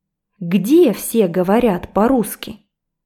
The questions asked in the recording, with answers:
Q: Где все говорят по-русски?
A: На перроне, на перроне, на платформе все говорят по-русски.